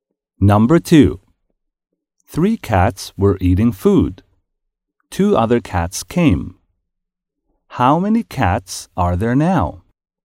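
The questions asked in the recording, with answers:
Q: How many cats are there now?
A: Five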